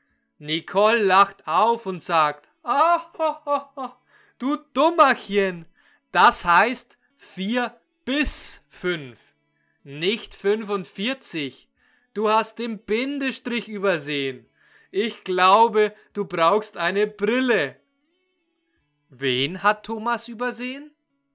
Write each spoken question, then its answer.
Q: Wen hat Thomas übersehen?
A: den Bindestrich. Er hat den Bindestrich zwischen der 4 und der 5 übersehen.